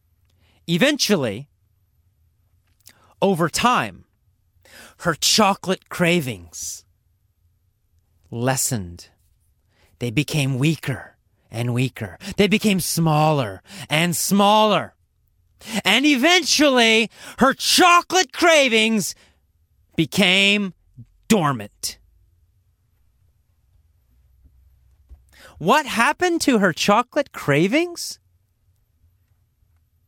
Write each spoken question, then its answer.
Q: What happened to her chocolate cravings?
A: They became dormant. They became quiet.